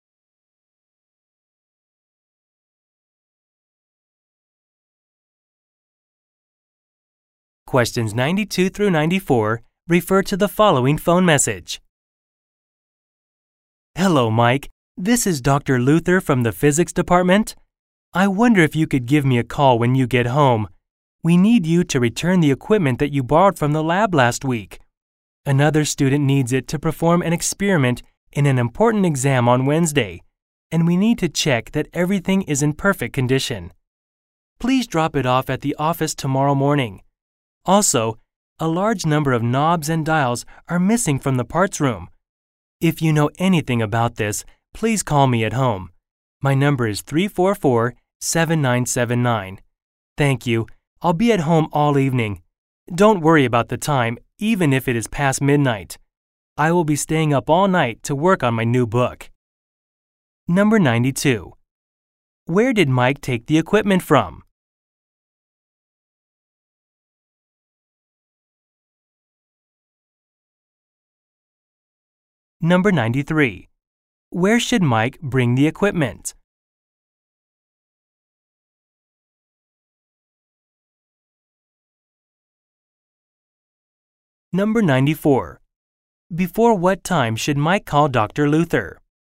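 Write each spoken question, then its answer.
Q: Where did Mike take the equipment from?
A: The lab

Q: Where should Mike bring the equipment?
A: To the office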